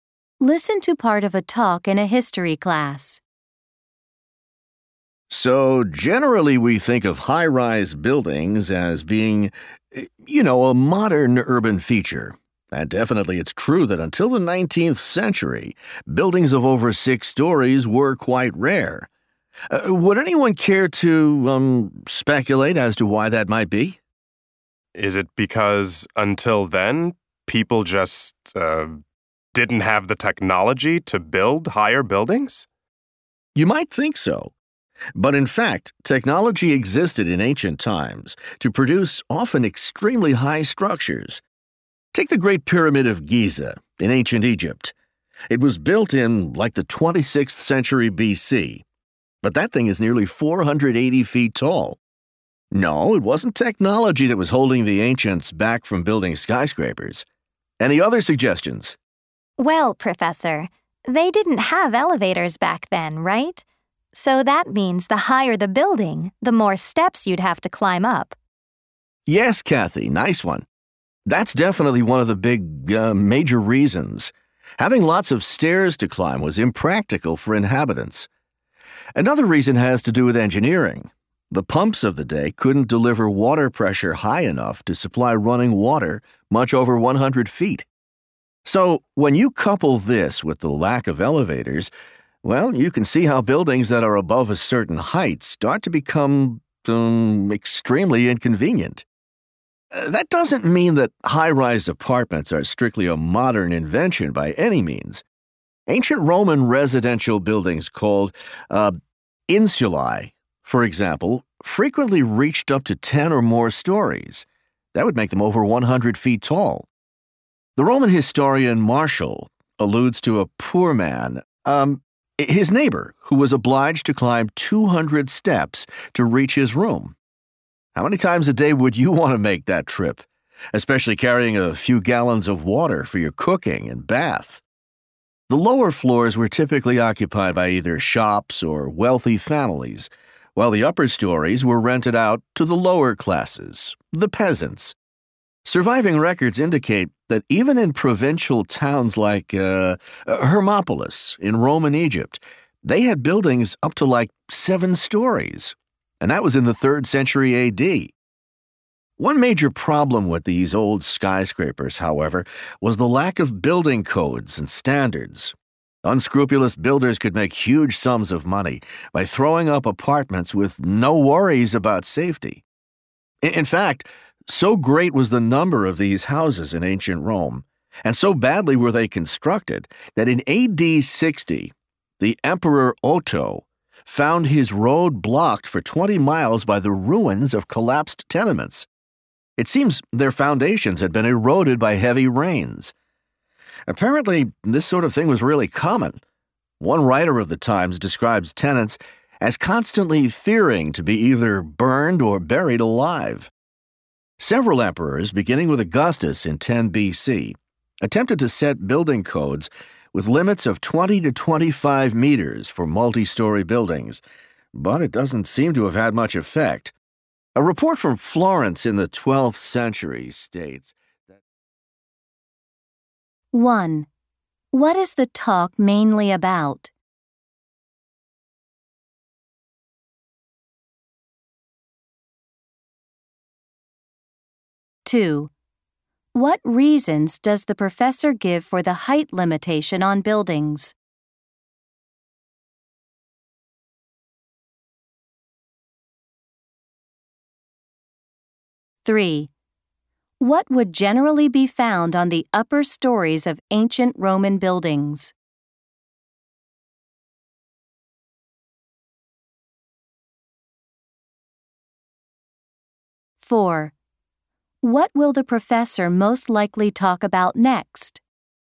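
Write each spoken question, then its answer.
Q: What is the talk mainly about?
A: Early high-rise buildings before modern times

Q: What reasons does the professor give for the height limitation on buildings?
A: No elevators, so many stairs to climb, and pumps could not supply water much above 100 feet

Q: What would generally be found on the upper stories of ancient Roman buildings?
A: Rented rooms of the lower classes (poor people)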